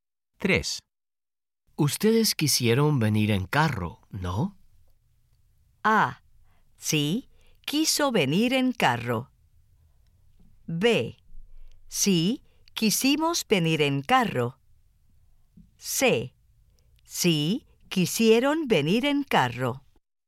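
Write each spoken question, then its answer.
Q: Ustedes quisieron venir en carro, ¿no?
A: B: Sí, quisimos venir en carro.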